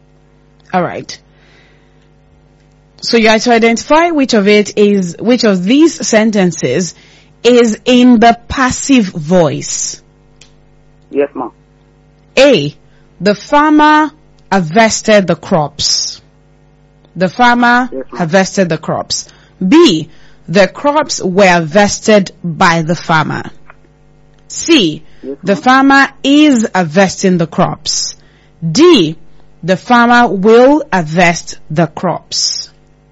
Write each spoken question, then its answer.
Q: So you have to identify which of these sentences is in the passive voice.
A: The correct answer is the crops were harvested by the farmer.